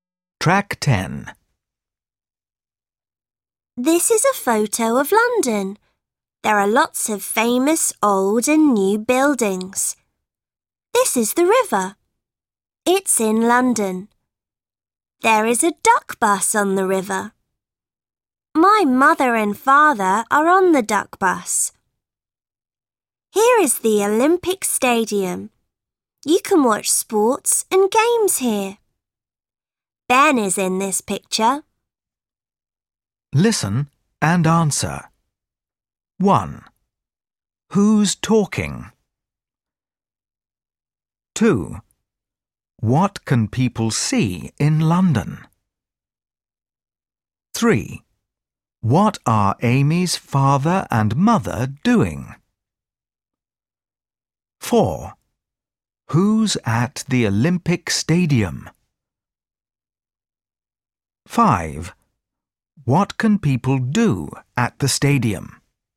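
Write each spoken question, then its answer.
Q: Who's talking?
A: Amy

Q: What can people see in London?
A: Lots of famous old and new buildings

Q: What are Amy's father and mother doing?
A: They are on the duck bus on the river

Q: Who's at the Olympic Stadium?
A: Ben

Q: What can people do at the stadium?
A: Watch sports and games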